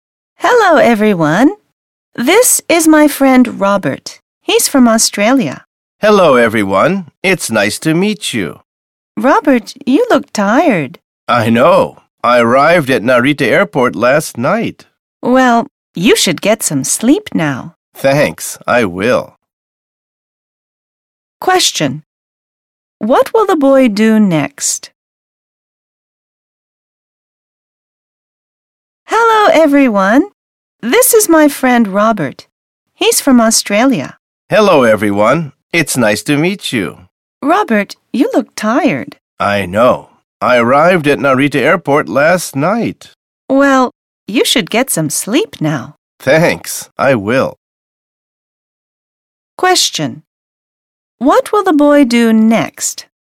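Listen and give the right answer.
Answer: He will get some sleep.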